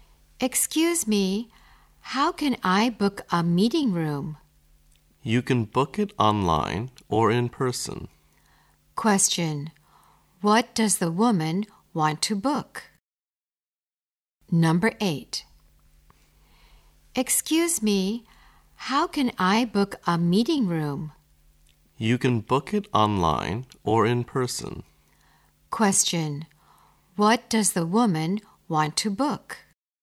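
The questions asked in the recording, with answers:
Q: what does the woman want to book?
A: A meeting room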